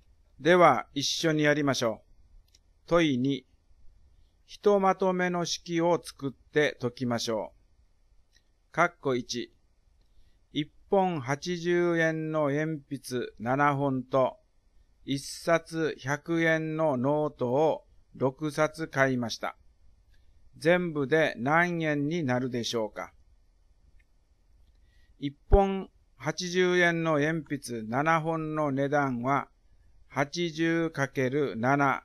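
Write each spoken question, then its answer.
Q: 全部で何円になるでしょうか。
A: 1160円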